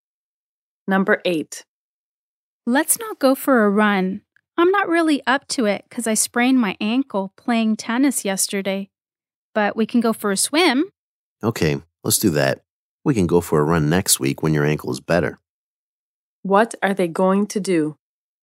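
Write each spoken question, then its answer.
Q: What are they going to do?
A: Go for a swim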